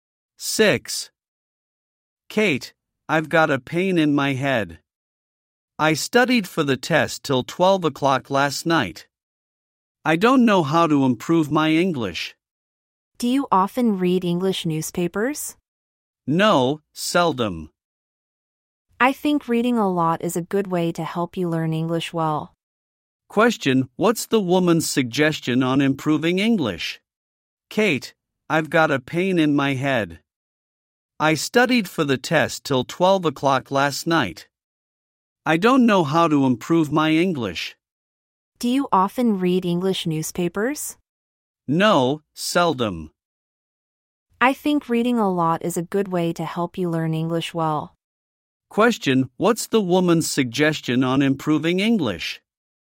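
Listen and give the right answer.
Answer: Reading a lot (e.g. English newspapers)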